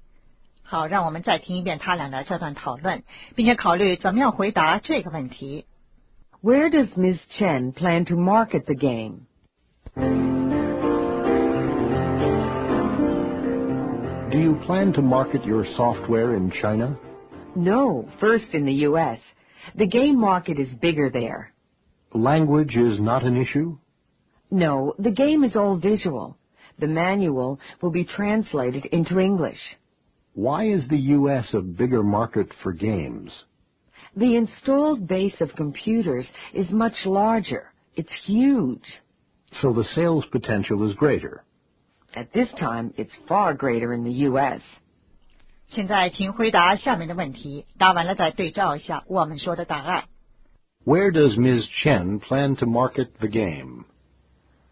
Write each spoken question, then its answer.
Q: Where does Ms. Chen plan to market the game?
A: In the U.S.